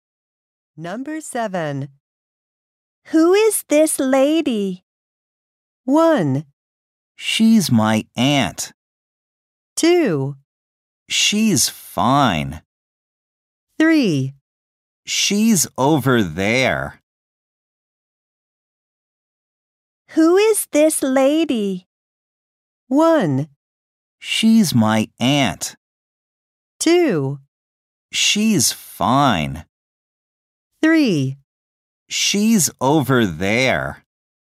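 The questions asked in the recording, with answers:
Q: Who is this lady?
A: 1: She's my aunt.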